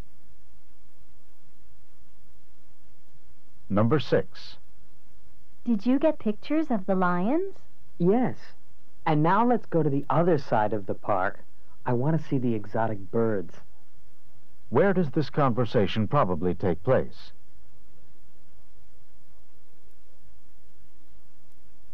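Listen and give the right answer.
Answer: At a zoo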